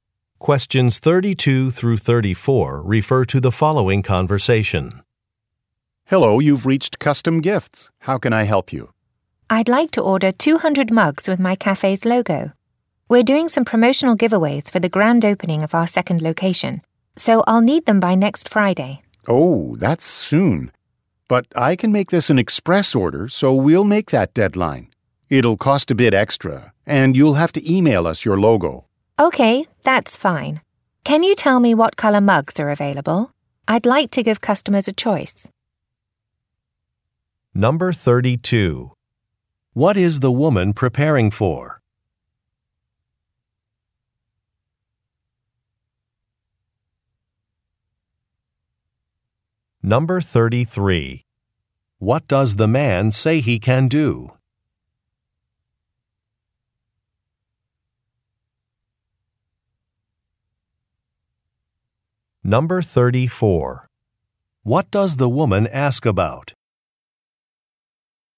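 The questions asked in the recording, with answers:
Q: What is the woman preparing for?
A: The grand opening of her cafe's second location

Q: What does the man say he can do?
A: Make it an express order to meet the deadline

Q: What does the woman ask about?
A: What mug colors are available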